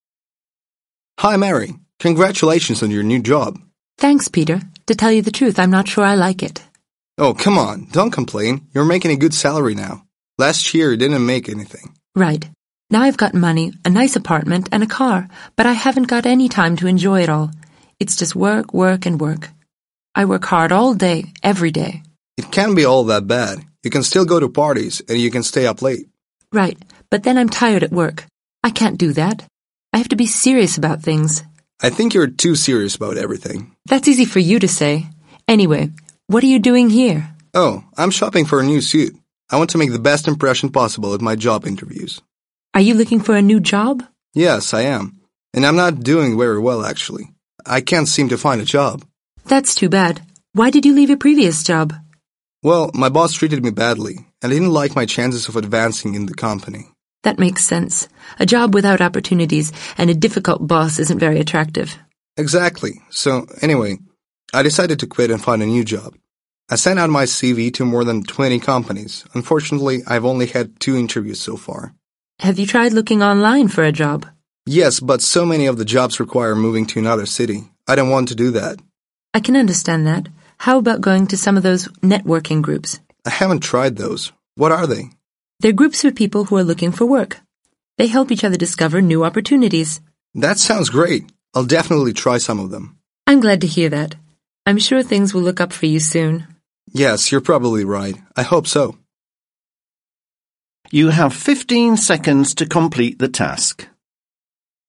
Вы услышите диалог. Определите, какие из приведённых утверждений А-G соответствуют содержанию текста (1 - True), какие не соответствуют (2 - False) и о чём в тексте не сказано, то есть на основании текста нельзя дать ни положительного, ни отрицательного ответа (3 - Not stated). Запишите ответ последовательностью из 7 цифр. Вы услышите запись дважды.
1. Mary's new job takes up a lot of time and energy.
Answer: True

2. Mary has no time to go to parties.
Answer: False

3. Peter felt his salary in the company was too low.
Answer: Not stated

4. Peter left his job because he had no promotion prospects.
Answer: True

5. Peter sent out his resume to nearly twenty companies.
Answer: False

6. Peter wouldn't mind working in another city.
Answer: False

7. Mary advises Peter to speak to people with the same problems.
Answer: True

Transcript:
Peter: HI. Mary. Congratulations on your new Job!
Mary: Thanks. Peter. To tell you the truth. I'm not so sure I like it.
Peter: Oh. come on. Don't complain. You're making a good salary now. Last year. you didn't make anything.
Mary: Right. Now. I've got money. a nice apartment and a car. But I haven't got any time to enjoy it all. It's just work, work and work. I work hard all day. every day.
Peter: It can't be all that bad. You can still go to parties, and you can stay up late.
Mary: Right. but then I'm tired at work. I can't do that. Now l have to be serious about things.
Peter: I think you are too serious about everything.
Mary: That's easy for you to say. Anyway. what are you doing here?
Peter: Oh. I'm shopping for a new suit. I want to make the best impression possible at my job interviews!
Mary: Are you looking for a new job?
Peter: Yes. I am. And I'm not doing very well. actually. I can't seem to find a job.
Mary: That's too bad. Why did you leave your previous job?
Peter: Well. my boss treated me badly. and I didn't like my chances of advancing in the company.
Mary: That makes sense. A job without opportunities and a difficult boss isn't very attractive.
Peter: Exactly! So. anyway, I decided to quit and find a new job. I sent out my CV to more than twenty companies. Unfortunately. I've only had two interviews so far.
Mary: Have you tried looking online for a job?
Peter: Yes. but so many of the jobs require moving to another city. I don't want to do that.
Mary: I can understand that. How about going to some of those networking groups?
Peter: I haven't tried those. What are they?
Mary: They're groups of people who are also looking for work. They help each other discover new opportunities.
Peter: That sounds great! I'll definitely try some of them.
Mary: I'm glad to hear that. I'm sure things will look up for you soon.
Peter: Yes. you're probably right. I hope so!